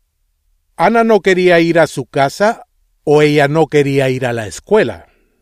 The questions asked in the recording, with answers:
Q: ¿Ana no quería ir a su casa o ella no quería ir a la escuela?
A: Ella no quería ir a la escuela.